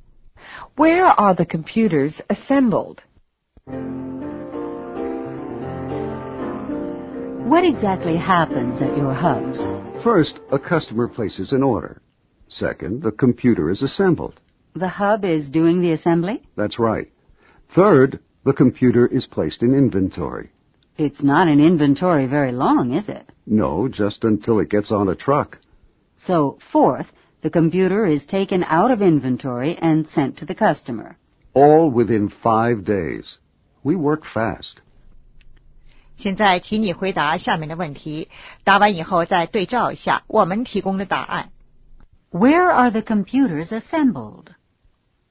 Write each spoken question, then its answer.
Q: Where are the computers assembled?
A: At the hubs.